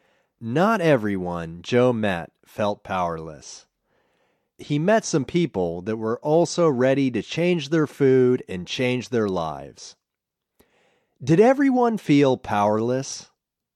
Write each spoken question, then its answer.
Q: Did everyone feel powerless?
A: No, everyone didn't feel powerless.